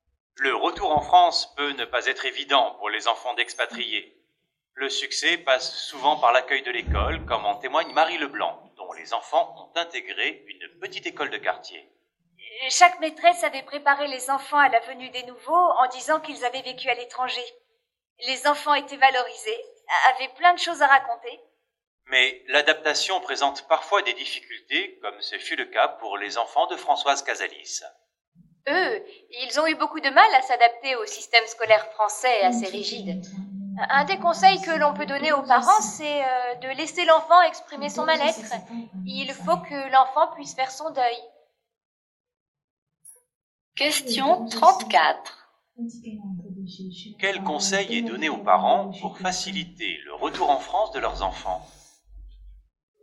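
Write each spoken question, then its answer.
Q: Quel conseil est donné aux parents pour faciliter le retour en France de leurs enfants ?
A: Laisser l'enfant exprimer son mal-être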